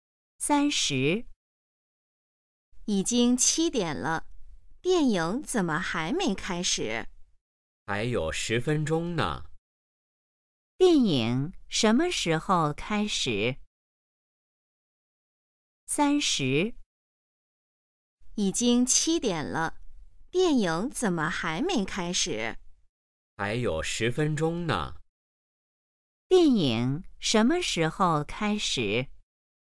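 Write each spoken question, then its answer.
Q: 电影什么时候开始?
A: 7点10分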